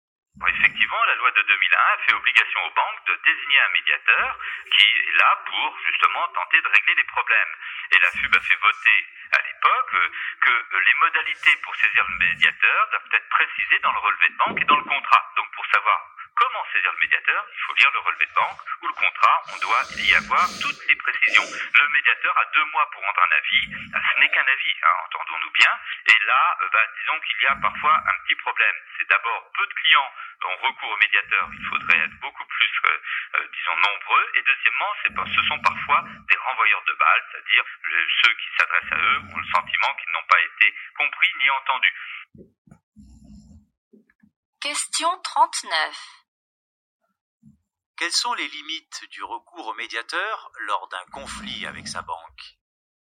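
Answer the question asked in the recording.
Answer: Il ne donne qu'un avis, peu de clients y ont recours et ils se sentent souvent mal entendus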